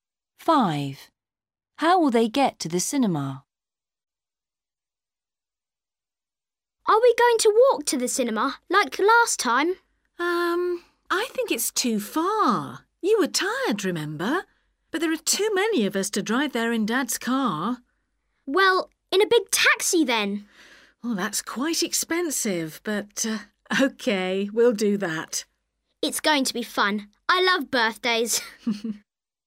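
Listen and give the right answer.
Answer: By taxi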